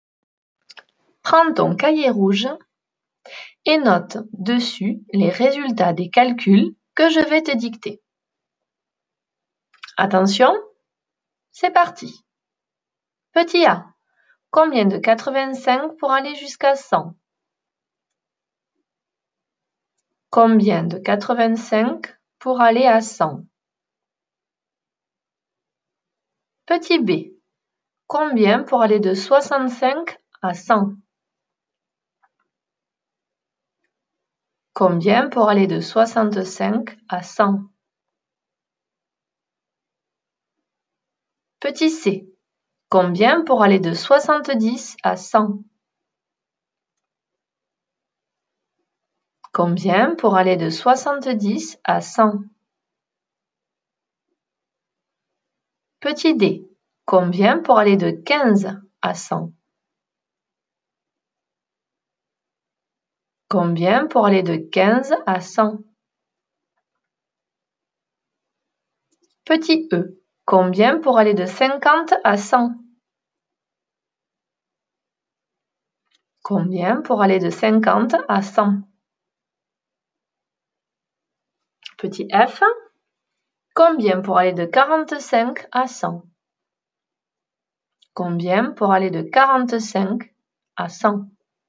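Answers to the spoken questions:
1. 15
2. 35
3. 30
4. 85
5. 50
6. 55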